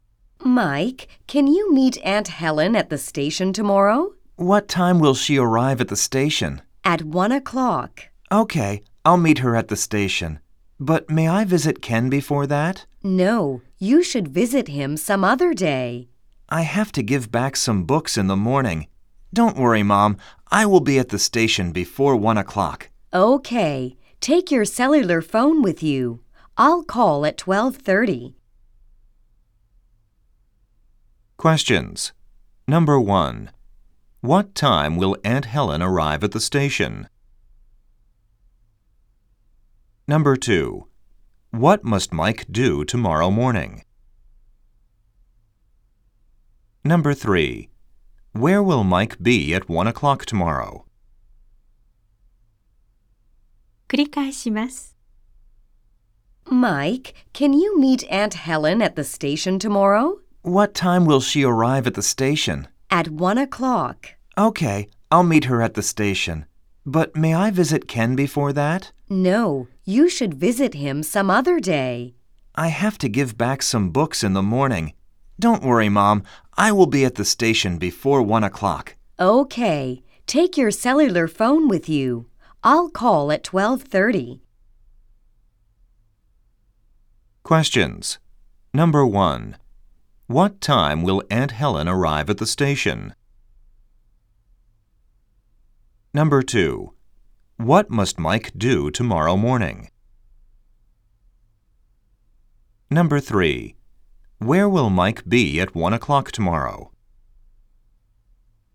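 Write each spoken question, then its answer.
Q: What time will Aunt Helen arrive at the station?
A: At 1 o'clock.

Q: Where will Mike be at 1 o'clock tomorrow?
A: At the station.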